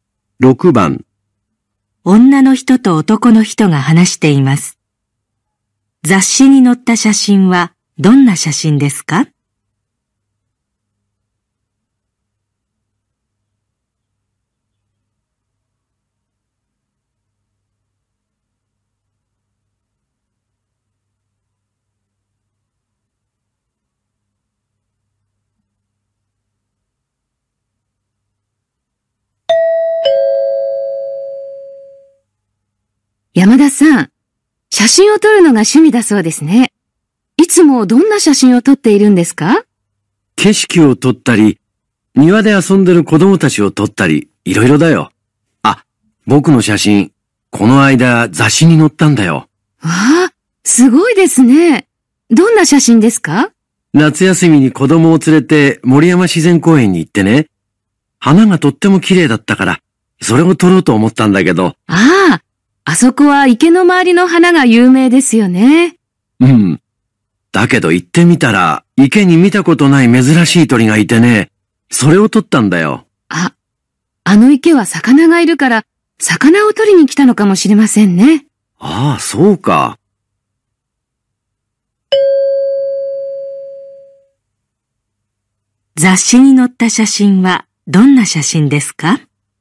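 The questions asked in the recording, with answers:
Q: 雑誌に載った写真はどんな写真ですか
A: 池にいた珍しい鳥の写真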